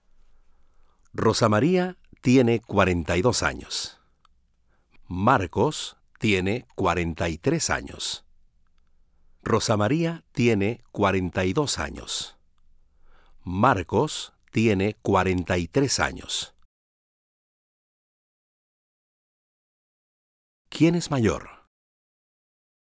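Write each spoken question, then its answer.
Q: ¿Quién es mayor?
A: Marcos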